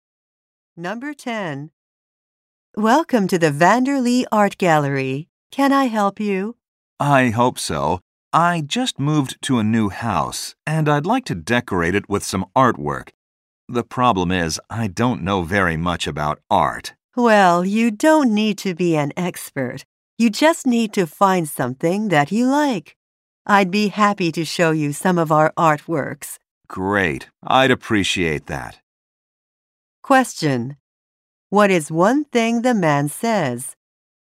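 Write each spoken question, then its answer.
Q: What is one thing the man says?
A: He doesn't know much about art.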